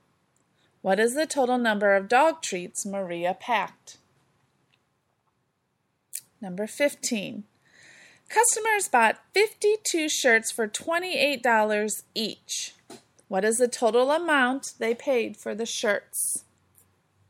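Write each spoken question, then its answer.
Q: What is the total amount they paid for the shirts?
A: $1,456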